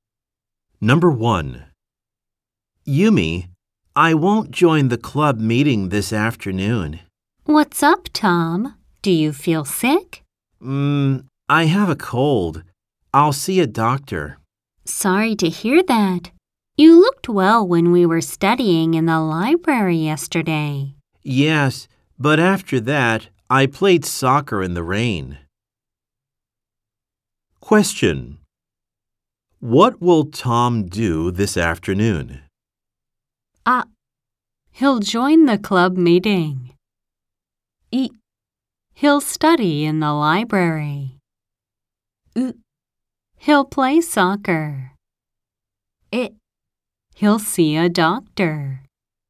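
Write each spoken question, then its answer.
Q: What will Tom do this afternoon?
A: え: He'll see a doctor.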